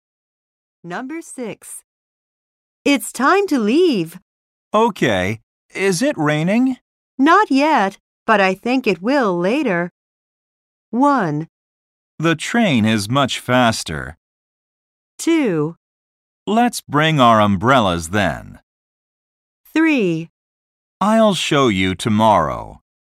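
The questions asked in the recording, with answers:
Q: Not yet, but I think it will later.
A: 2: Let's bring our umbrellas then.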